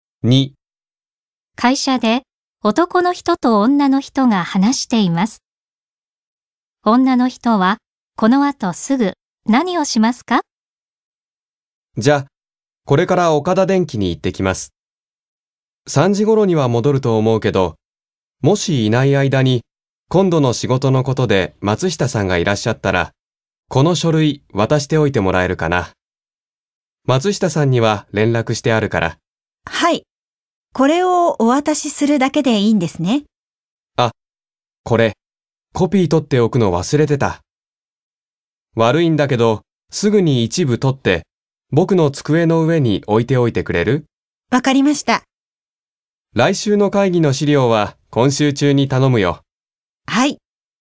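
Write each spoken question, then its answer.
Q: 女の人はこの後すぐ何をしますか?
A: 書類のコピーを一部取って、男の人の机の上に置く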